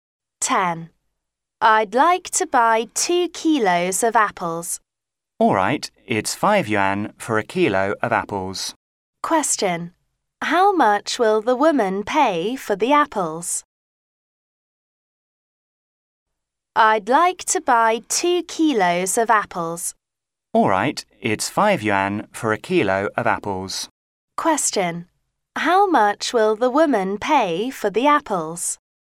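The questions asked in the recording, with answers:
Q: How much will the woman pay for the apples?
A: 10 yuan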